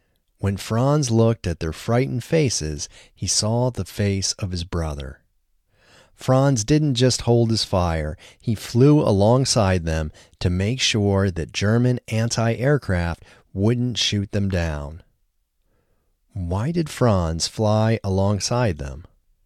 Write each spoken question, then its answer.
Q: Why did Franz fly alongside them?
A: Franz flew alongside them to make sure that German anti-aircraft wouldn't shoot them down.